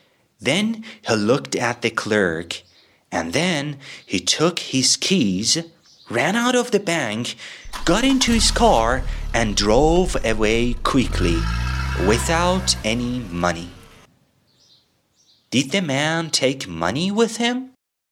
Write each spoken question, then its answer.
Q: Did the man take money with him?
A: No, he didn't take money with him.